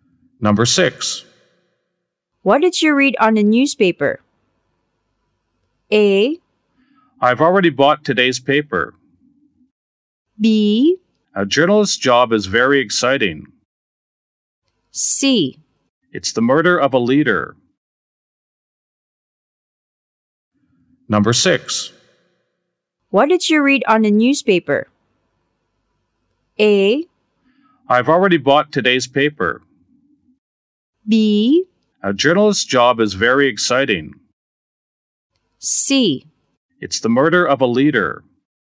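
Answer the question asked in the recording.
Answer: C: It's the murder of a leader.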